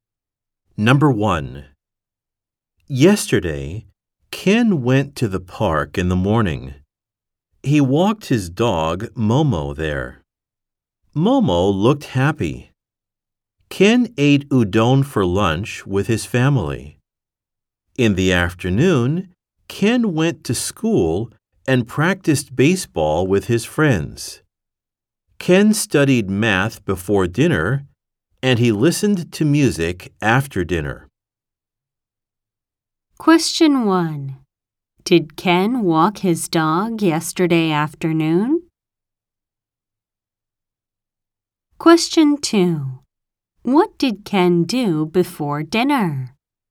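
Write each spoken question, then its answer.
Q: Did Ken walk his dog yesterday afternoon?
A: No, he didn't.

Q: What did Ken do before dinner?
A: He studied math.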